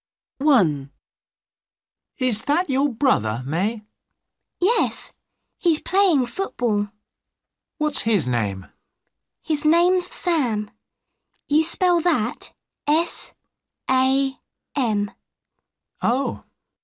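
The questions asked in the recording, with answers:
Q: What's his name?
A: Sam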